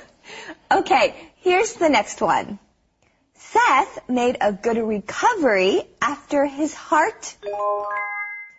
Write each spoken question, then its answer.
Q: Seth made a good recovery after his heart.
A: Seth made a good recovery after his surgery.